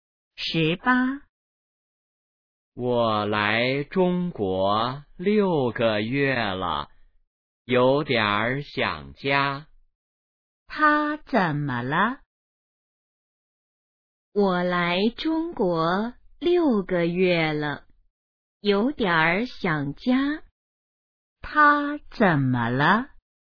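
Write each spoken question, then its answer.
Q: 他怎么了?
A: 有点儿想家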